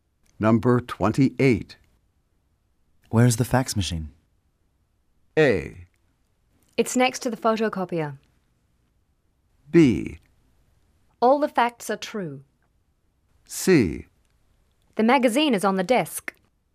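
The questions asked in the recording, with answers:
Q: Where's the fax machine?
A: A: It's next to the photocopier.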